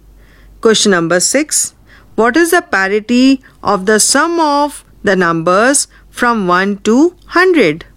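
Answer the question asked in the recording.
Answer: Even (the sum is 5050)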